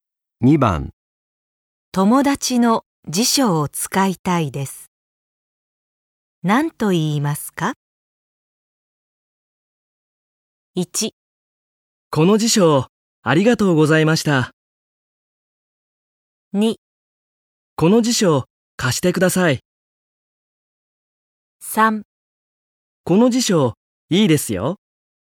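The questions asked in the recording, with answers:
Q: 友達の辞書を使いたいです。何と言いますか?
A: 2: この辞書、貸してください。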